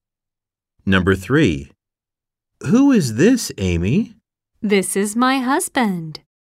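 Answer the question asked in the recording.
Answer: my husband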